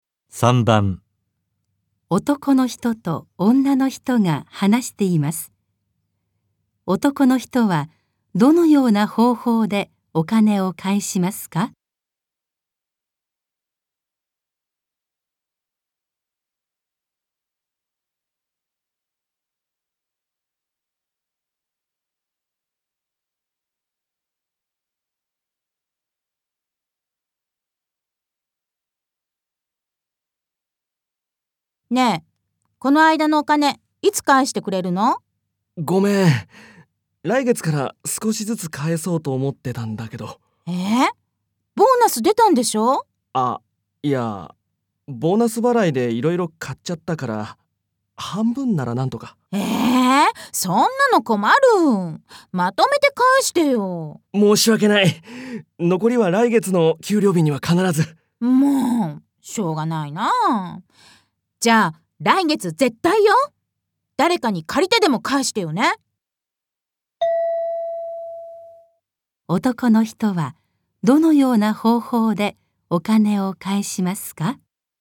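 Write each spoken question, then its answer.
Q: 男の人はどのような方法でお金を返しますか?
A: 今ボーナスで半分返し、残りは来月の給料日に返す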